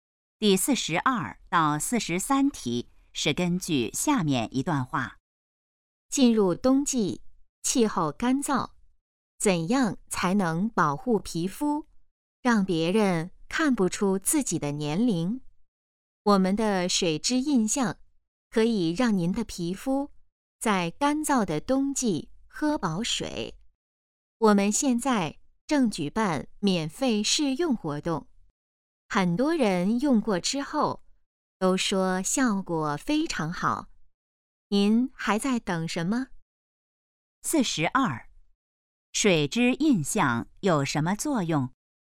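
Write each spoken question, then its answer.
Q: 水质印象有什么作用?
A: 让皮肤在干燥的冬季喝饱水(保湿)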